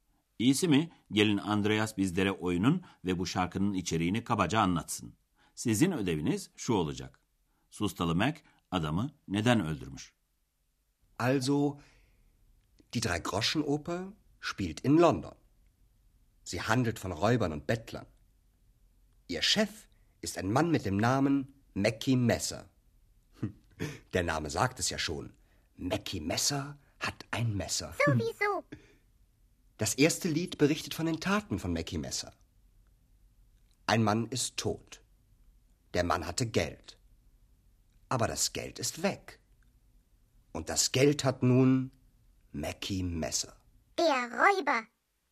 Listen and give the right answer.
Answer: Mackie Messer adamı öldürmüş çünkü adamın parası varmış.